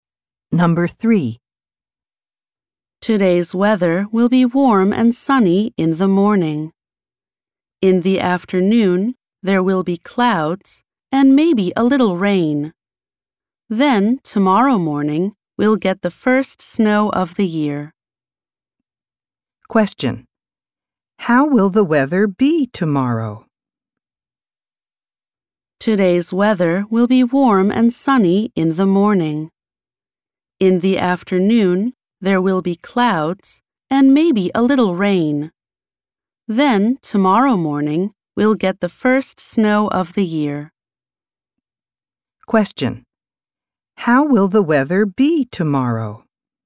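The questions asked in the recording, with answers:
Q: How will the weather be tomorrow?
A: Snowy (the first snow of the year)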